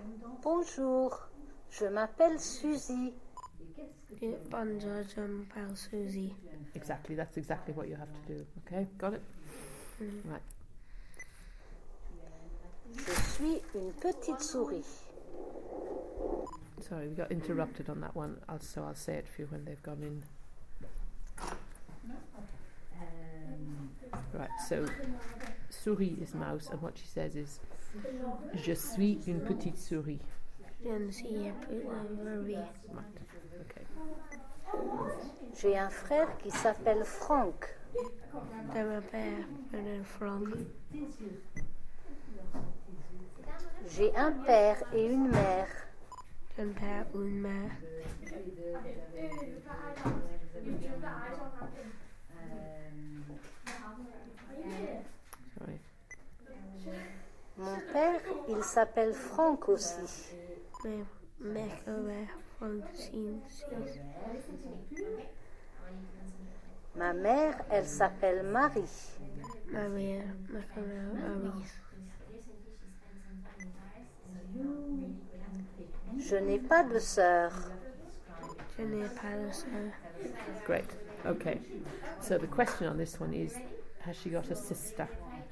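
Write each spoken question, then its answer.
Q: has she got a sister?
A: No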